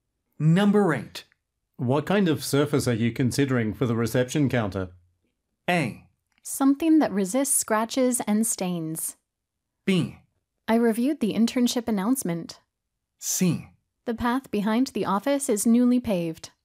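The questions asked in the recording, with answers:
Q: What kind of surface are you considering for the reception counter?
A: A: Something that resists scratches and stains.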